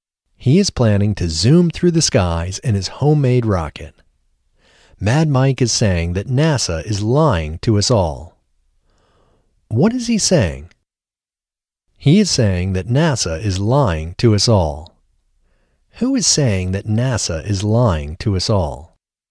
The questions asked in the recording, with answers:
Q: Who is saying that NASA is lying to us all?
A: Mad Mike is saying that NASA is lying to us all.